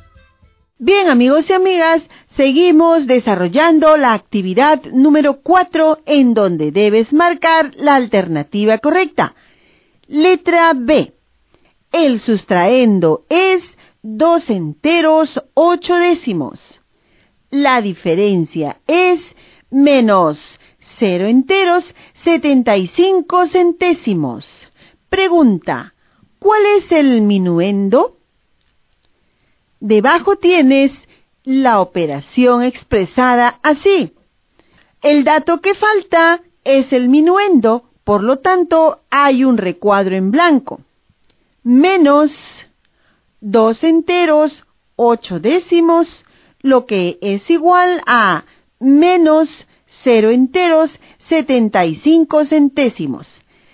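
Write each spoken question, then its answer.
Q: Pregunta, ¿cuál es el minuendo?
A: 2 enteros 5 centésimos (2,05)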